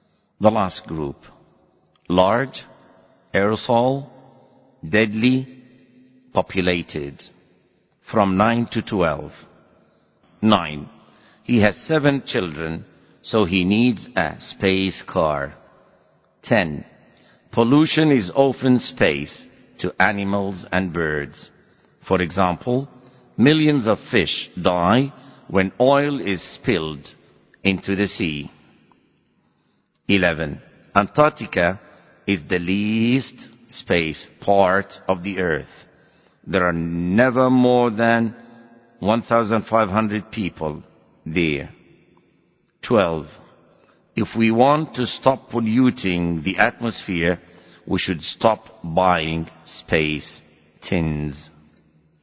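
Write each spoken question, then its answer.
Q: 9. He has 7 children, so he needs a space car.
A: large

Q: 10. Pollution is often space to animals and birds.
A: deadly

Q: 11. Antarctica is the least space part of the earth.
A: populated

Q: 12. If we want to stop polluting the atmosphere, we should stop buying space tins.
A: aerosol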